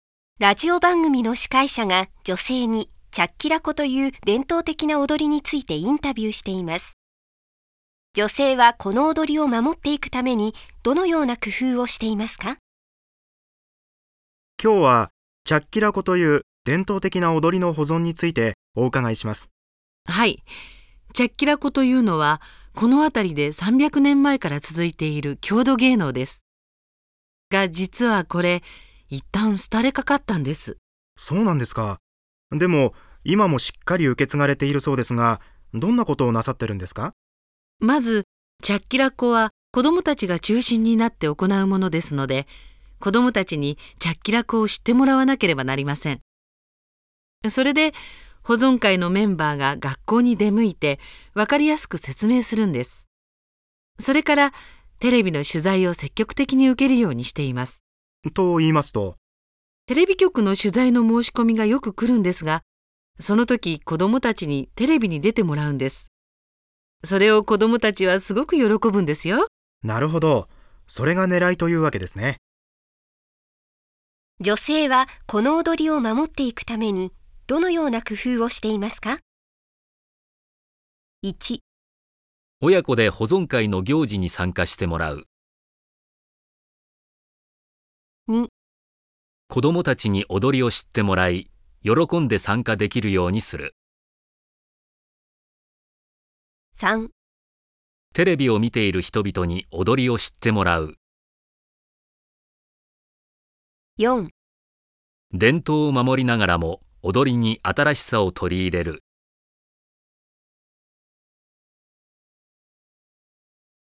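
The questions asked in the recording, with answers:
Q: 女性はこの踊りを守っていくためにどのような工夫をしていますか?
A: 2: 子どもたちに踊りを知ってもらい喜んで参加できるようにする。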